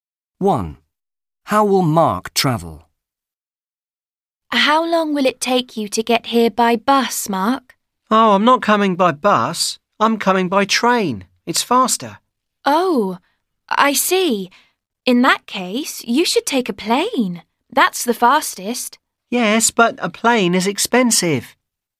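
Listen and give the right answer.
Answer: By train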